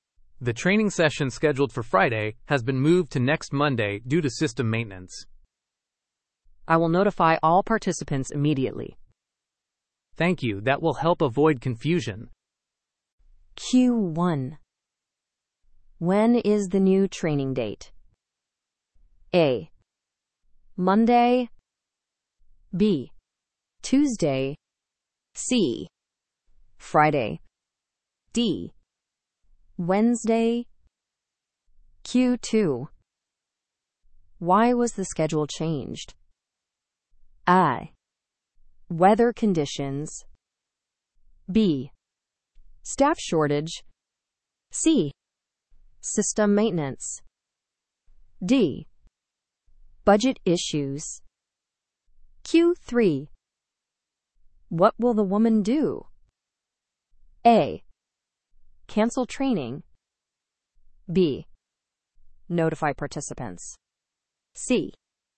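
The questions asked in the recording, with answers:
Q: When is the new training date?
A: A: Monday.

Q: Why was the schedule changed?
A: C: System maintenance.

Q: What will the woman do?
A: B: Notify participants.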